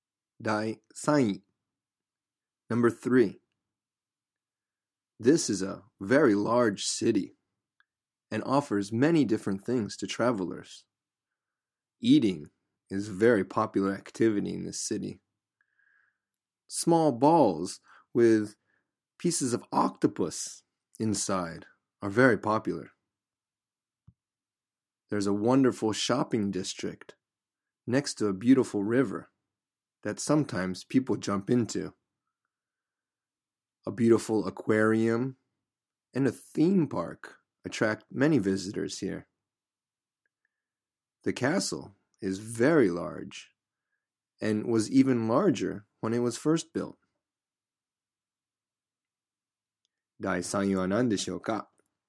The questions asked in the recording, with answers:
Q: 第3位は何でしょうか?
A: Yes, 大阪。